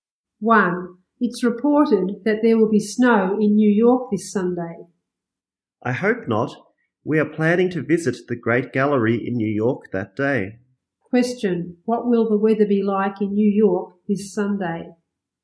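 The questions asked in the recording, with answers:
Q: What will the weather be like in New York this Sunday?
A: Snowy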